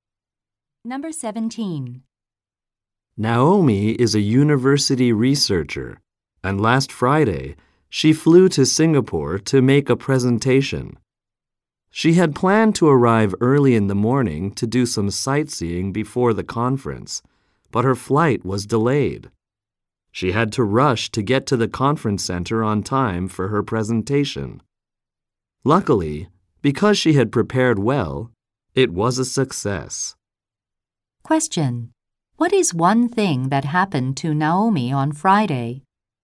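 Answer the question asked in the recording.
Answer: Her flight was delayed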